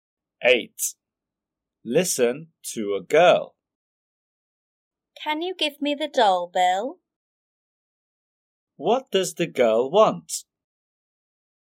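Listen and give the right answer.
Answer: the doll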